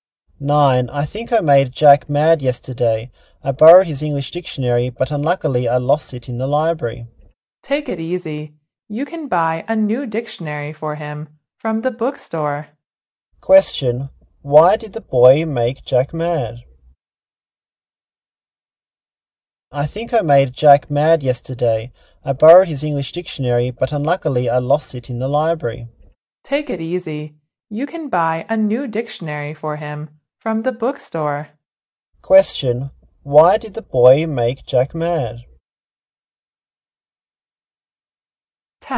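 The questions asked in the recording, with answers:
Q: why did the boy make Jack mad?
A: He lost Jack's English dictionary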